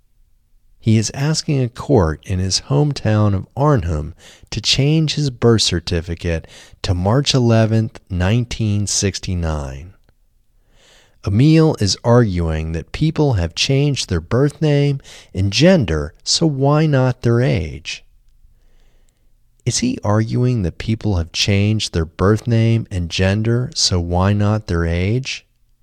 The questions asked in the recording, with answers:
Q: Is he arguing that people have changed their birth name and gender, so why not their age?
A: Yes, he is arguing that people have changed their birth name and gender, so why not their age?